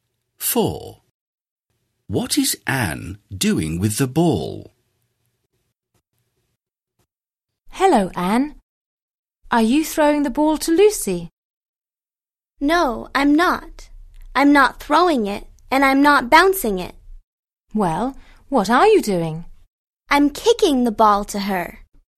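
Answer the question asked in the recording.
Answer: kicking it to Lucy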